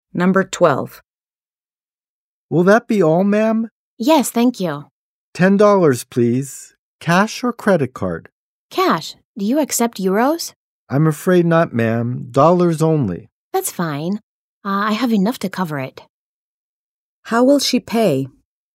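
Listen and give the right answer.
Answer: In cash (dollars)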